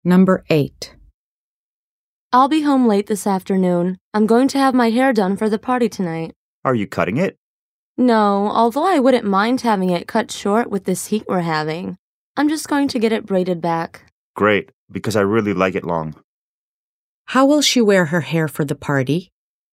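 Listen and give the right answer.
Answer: Long and braided back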